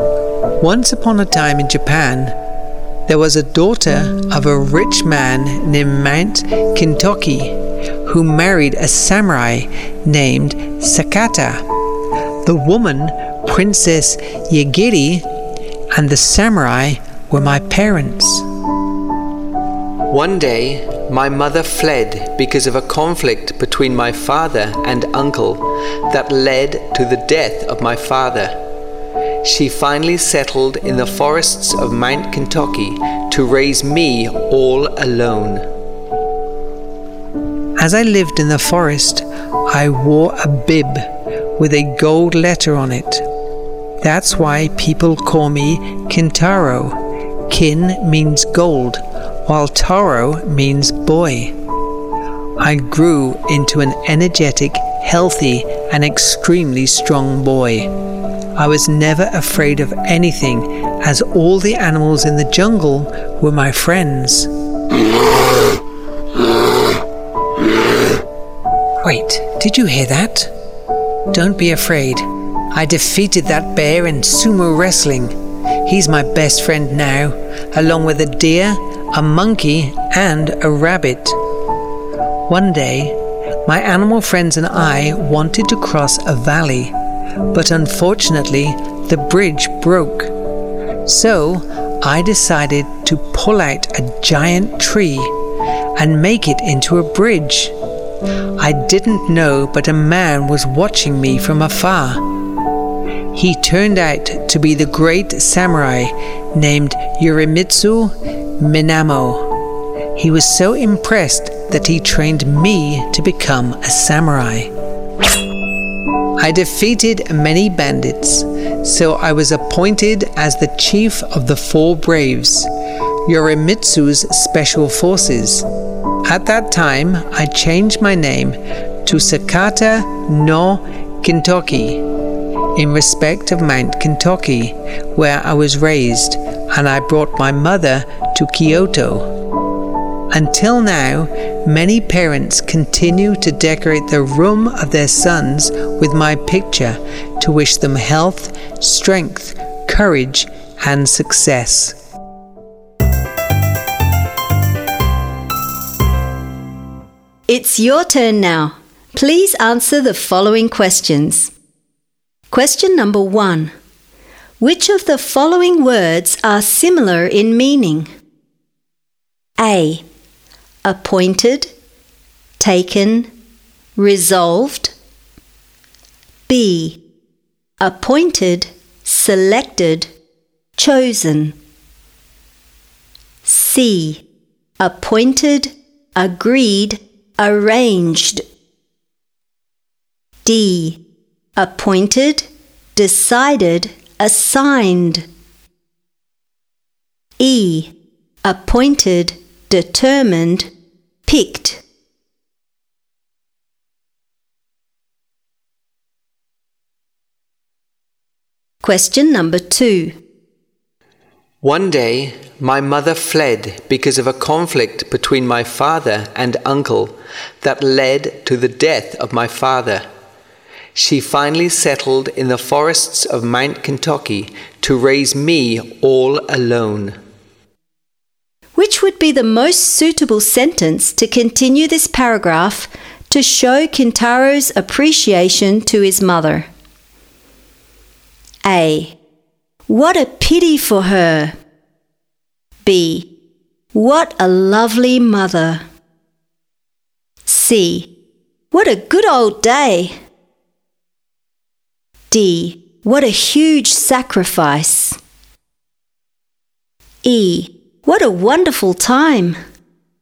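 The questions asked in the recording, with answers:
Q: Which of the following words are similar in meaning?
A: B: Appointed, selected, chosen.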